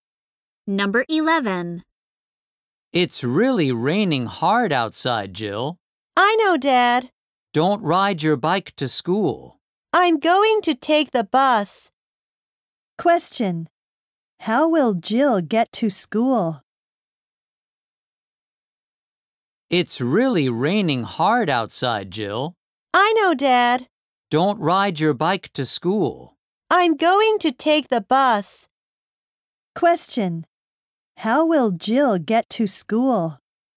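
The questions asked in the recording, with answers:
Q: How will Jill get to school?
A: By bus.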